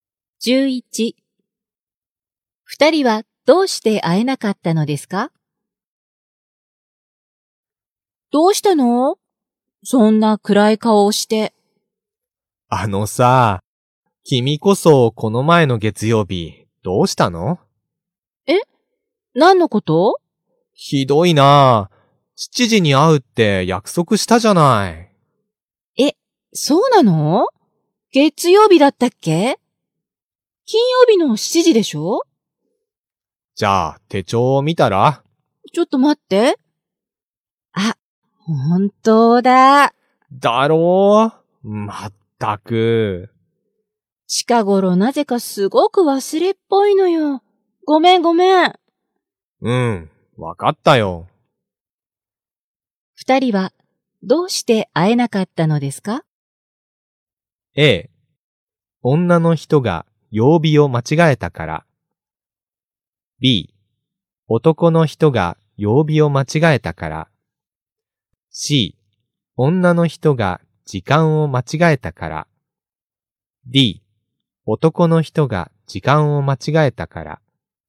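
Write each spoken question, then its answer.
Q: 二人はどうして会えなかったのですか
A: A: 女の人が曜日を間違えたから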